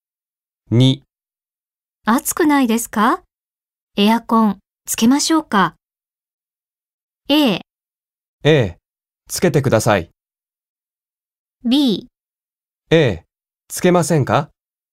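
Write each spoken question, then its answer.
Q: 暑くないですか?エアコンつけましょうか。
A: A: ええ、つけてください。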